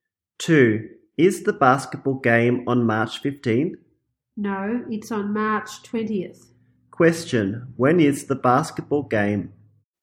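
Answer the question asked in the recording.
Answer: March 20th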